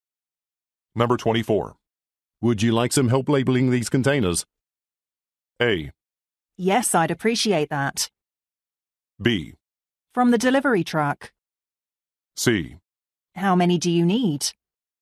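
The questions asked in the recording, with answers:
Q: Would you like some help labeling these containers?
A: A: Yes, I'd appreciate that.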